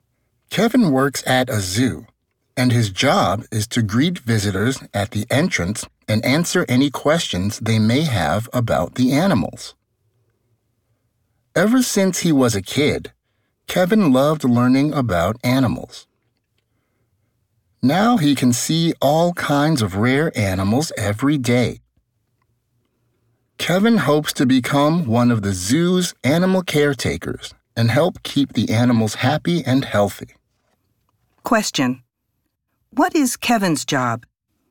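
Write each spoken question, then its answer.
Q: What is Kevin's job?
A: He greets visitors at the zoo entrance and answers their questions about the animals.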